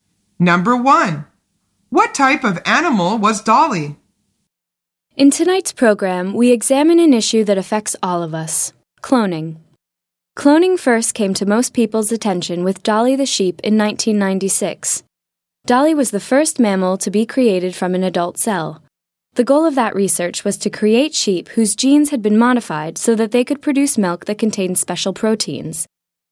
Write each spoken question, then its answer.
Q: What type of animal was Dolly?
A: The answer is a sheep.